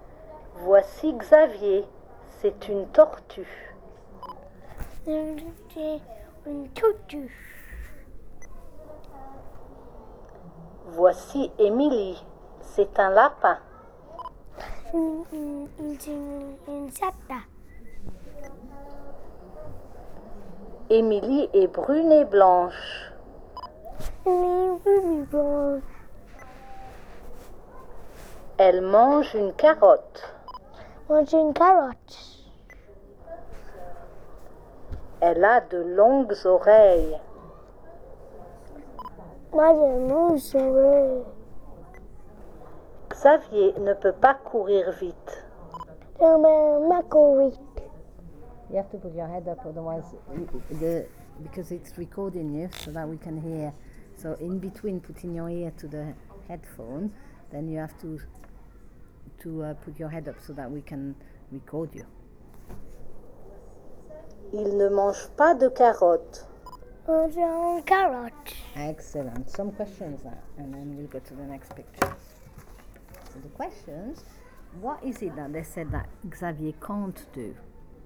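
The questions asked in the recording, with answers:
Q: So the questions, what is it that they said that Xavier can't do?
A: Run fast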